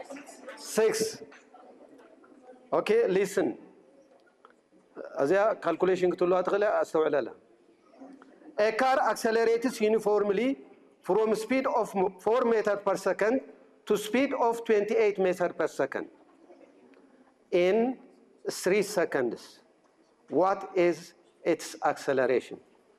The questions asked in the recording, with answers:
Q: What is its acceleration?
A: 8 meters per second.